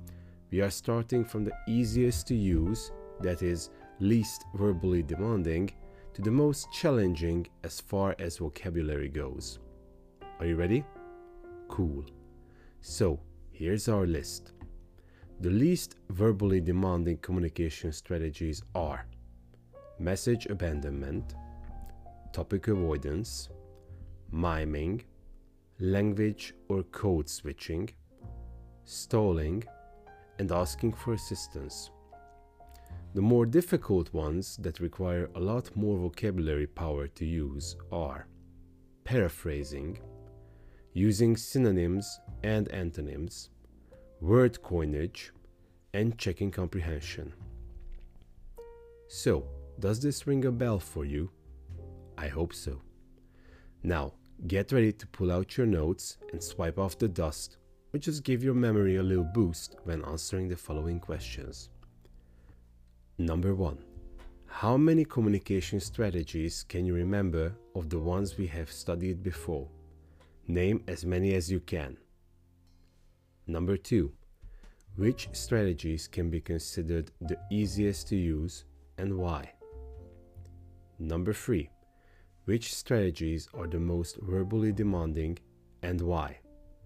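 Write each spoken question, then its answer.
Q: Which strategies can be considered the easiest to use and why?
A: Message abandonment, topic avoidance, miming, language or code switching, stalling and asking for assistance, because they are the least verbally demanding.

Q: Which strategies are the most verbally demanding and why?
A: Paraphrasing, using synonyms and antonyms, word coinage and checking comprehension, because they need much more vocabulary.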